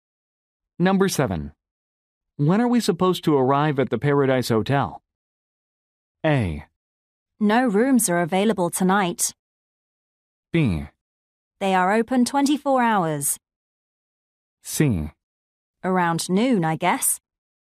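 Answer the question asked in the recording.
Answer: C: Around noon, I guess.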